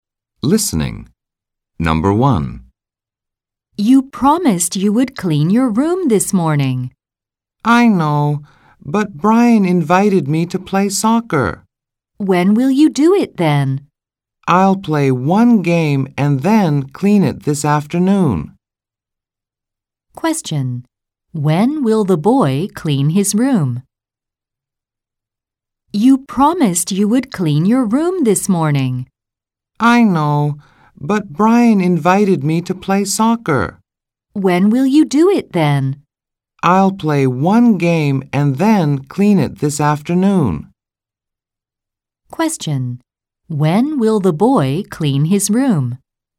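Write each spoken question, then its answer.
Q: When will the boy clean his room?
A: This afternoon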